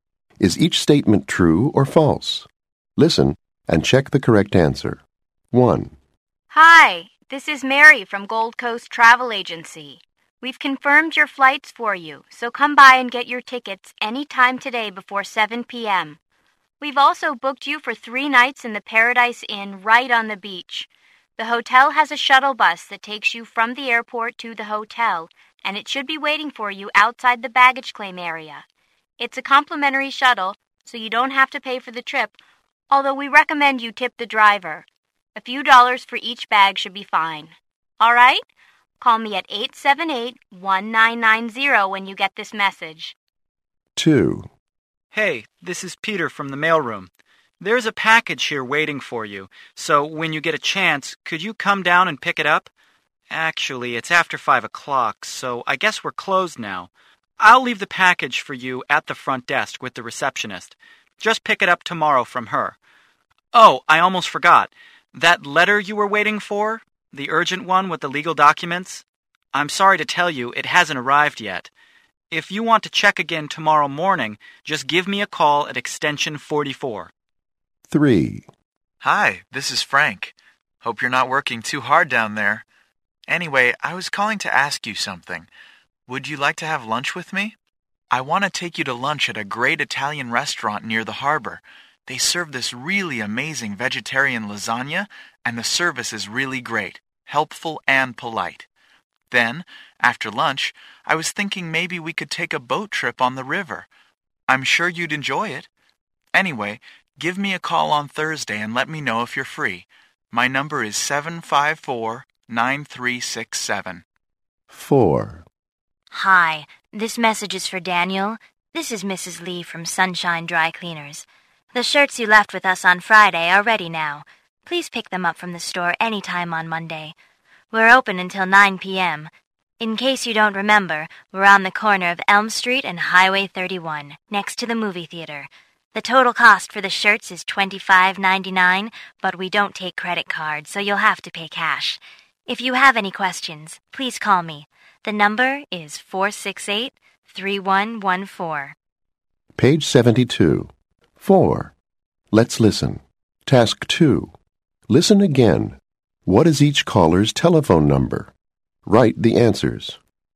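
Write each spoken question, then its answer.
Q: What is each caller's telephone number?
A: 1. Mary: 878-1990; 2. Peter: extension 44; 3. Frank: 754-9367; 4. Mrs. Lee: 468-3114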